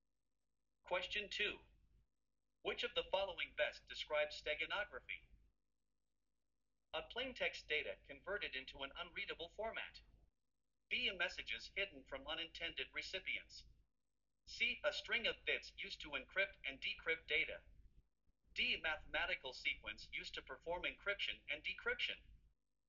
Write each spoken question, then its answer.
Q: Which of the following best describes steganography?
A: The correct answer is B.